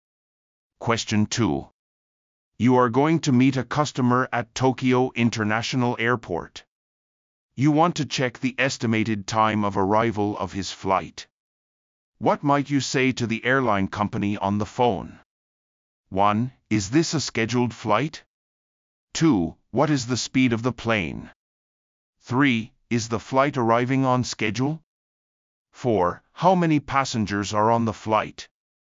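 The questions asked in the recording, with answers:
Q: What might you say to the airline company on the phone?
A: 3: Is the flight arriving on schedule?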